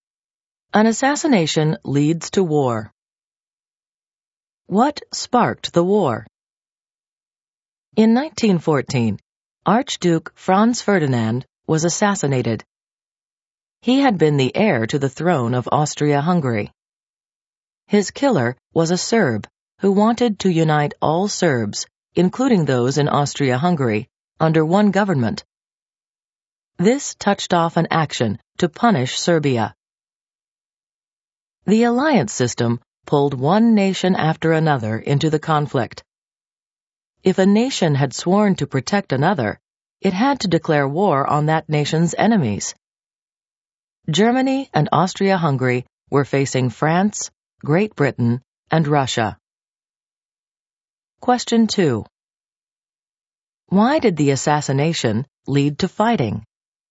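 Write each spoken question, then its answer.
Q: Why did the assassination lead to fighting?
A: Austria-Hungary moved to punish Serbia, and the alliance system pulled one nation after another into the war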